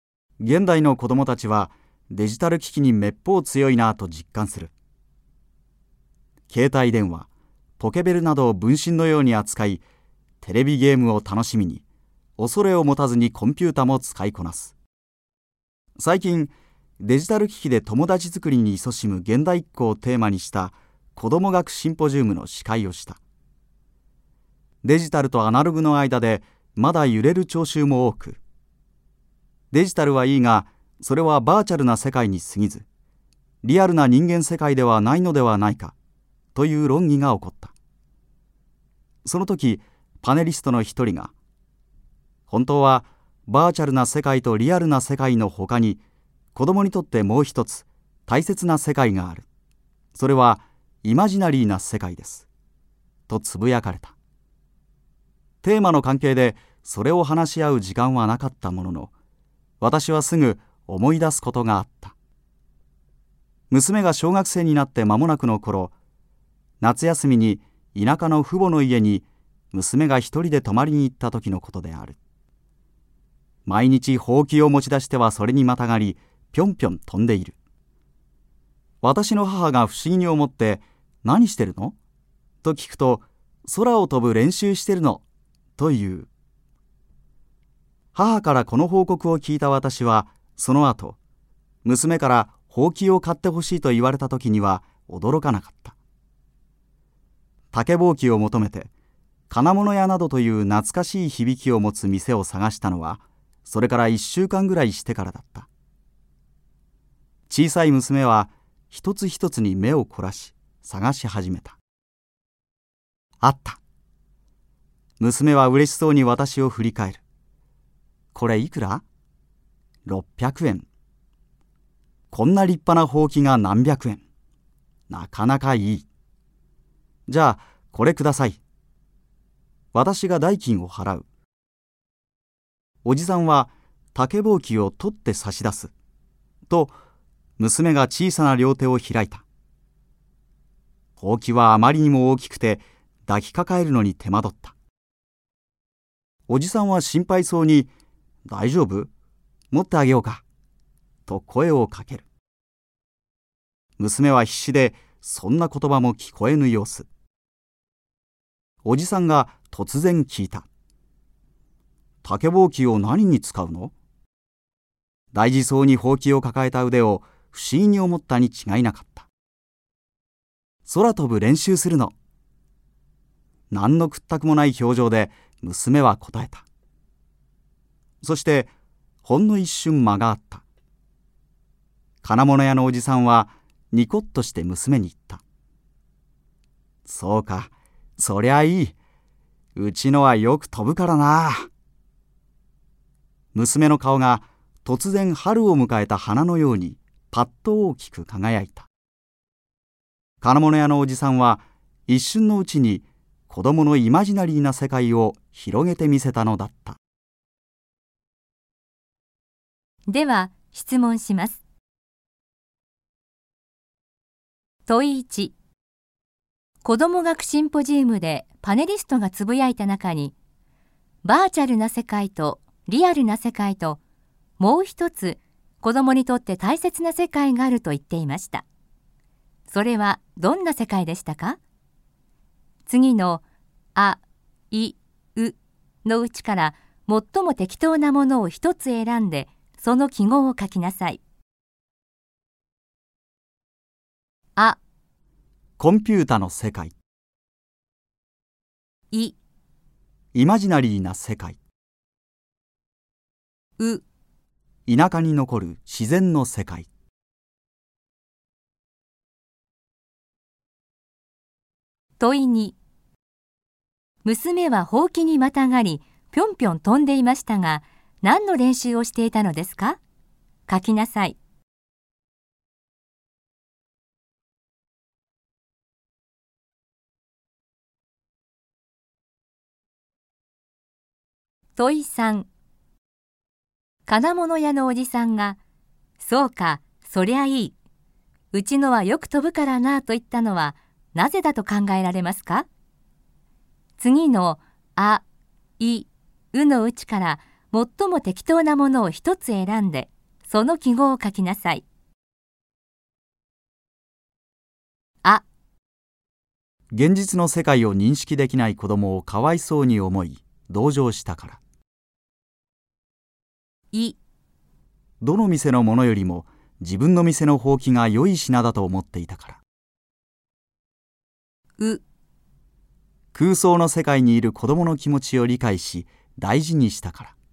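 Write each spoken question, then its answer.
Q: 子ども学シンポジウムでパネリストがつぶやいた中に、バーチャルな世界とリアルな世界と、もう一つ子どもにとって大切な世界があると言っていました。それはどんな世界でしたか?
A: い: イマジナリーな世界

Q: 娘はほうきにまたがり ぴょんぴょん飛んでいましたが、何の練習をしていたのですか?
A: 空を飛ぶ練習

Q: 金物屋のおじさんが、そうか、そりゃいい。うちのはよく飛ぶからなと言ったのは、なぜだと考えられますか?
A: う: 空想の世界にいる子供の気持ちを理解し、大事にしたから。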